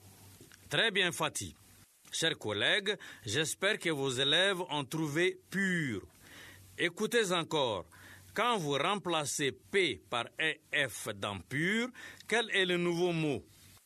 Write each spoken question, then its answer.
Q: Quand vous remplacez P par EF dans pur, quel est le nouveau mot?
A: j'espère que vos élèves ont trouvé fur.